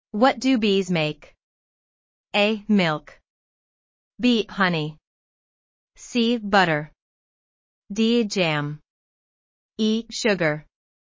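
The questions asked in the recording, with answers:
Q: What do bees make?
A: B: Honey.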